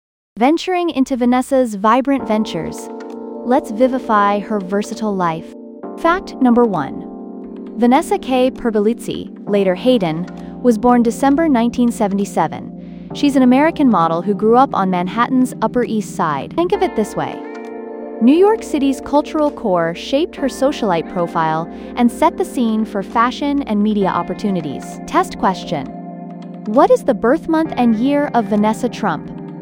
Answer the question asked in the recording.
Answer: December 1977